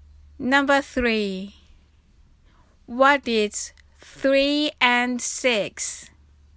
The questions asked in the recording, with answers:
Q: What is 3 and 6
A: equals 9.